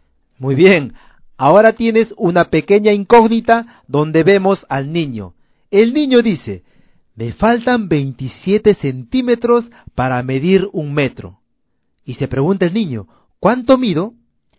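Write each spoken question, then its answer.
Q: ¿cuánto mido?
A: 73 centímetros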